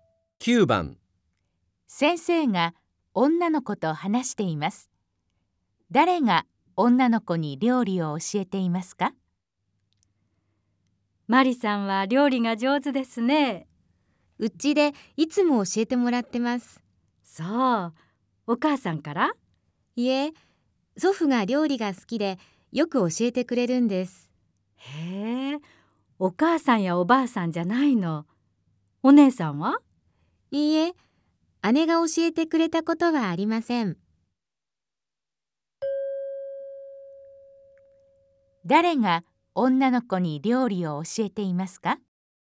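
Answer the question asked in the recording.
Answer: 祖父(おじいさん)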